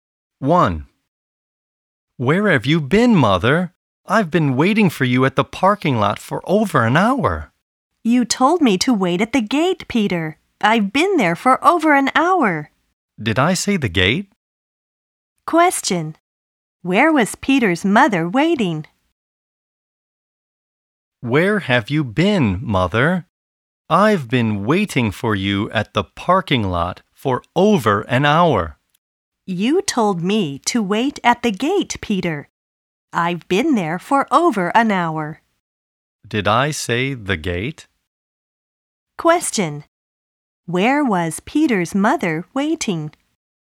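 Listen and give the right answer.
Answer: At the gate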